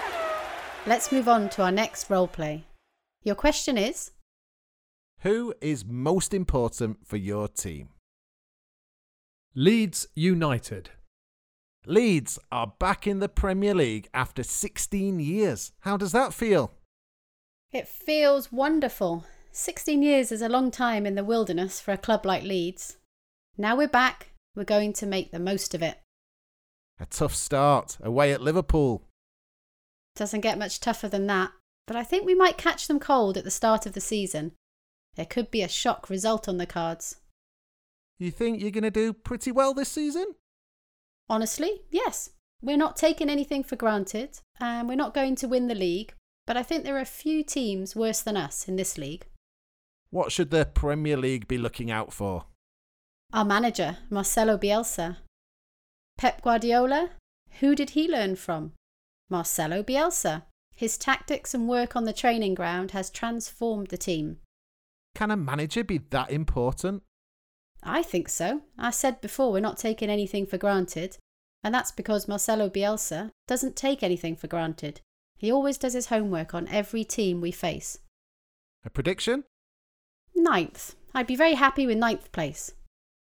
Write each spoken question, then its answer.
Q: Who is most important for your team?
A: The answer is the Leeds United manager, Marcelo Bielsa.